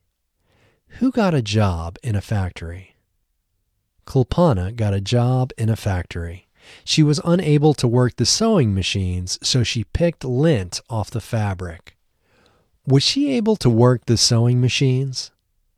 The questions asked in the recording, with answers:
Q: Was she able to work the sewing machines?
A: No, she was unable to work the sewing machines.